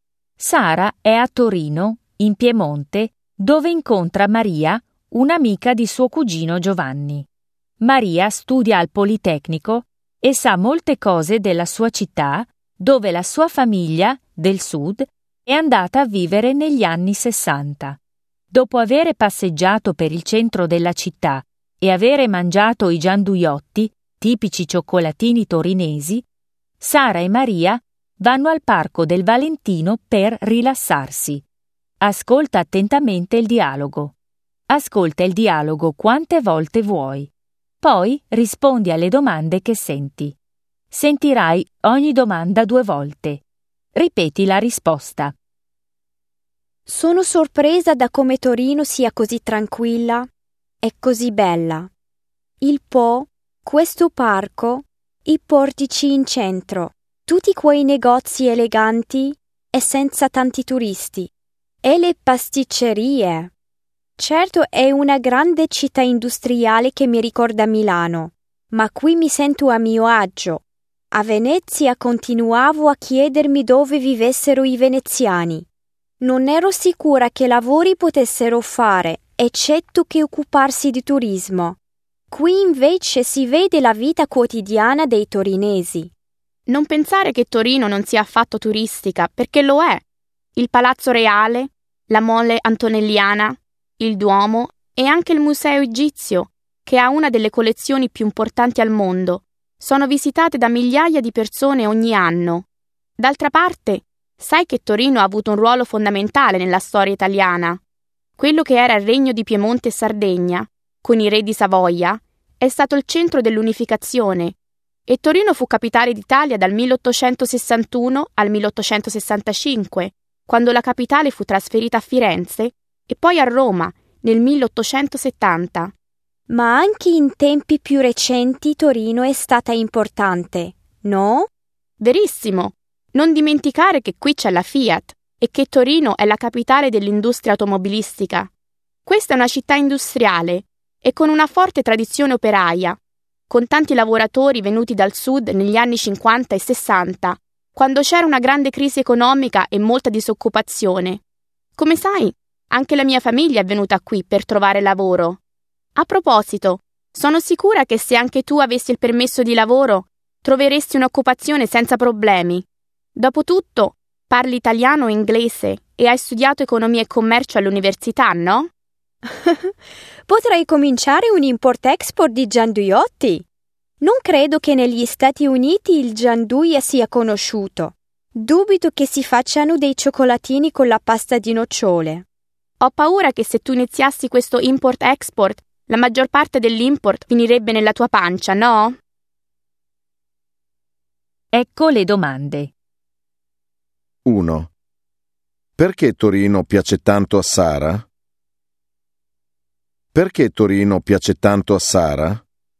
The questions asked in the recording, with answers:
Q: Perché Torino piace tanto a Sara?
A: Perché è una città tranquilla, senza tanti turisti.